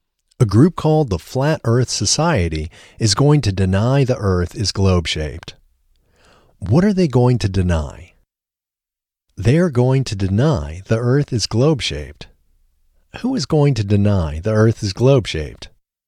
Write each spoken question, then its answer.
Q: Who is going to deny the Earth is globe-shaped?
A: A group called the Flat Earth Society is going to deny the Earth is globe-shaped.